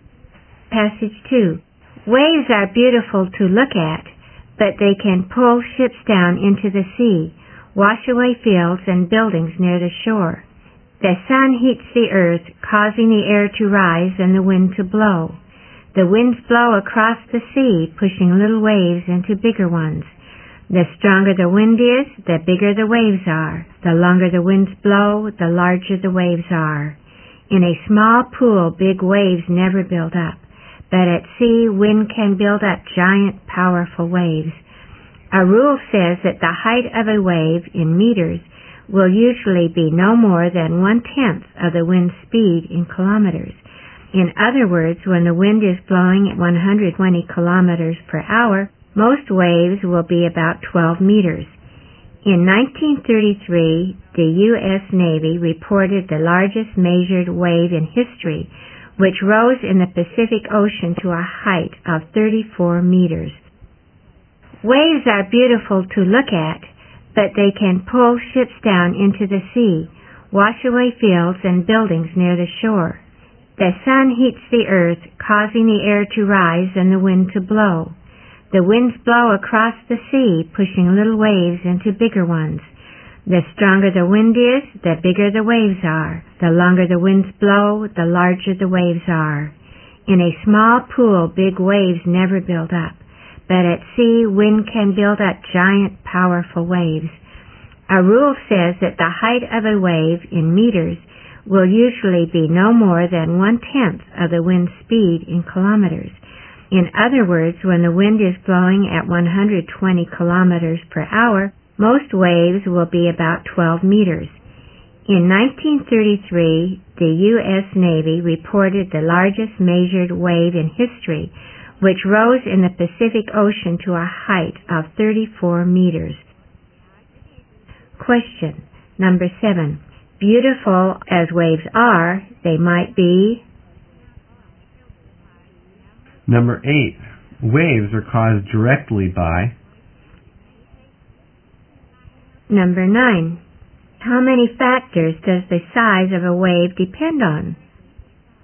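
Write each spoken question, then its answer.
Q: Waves are caused directly by...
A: The wind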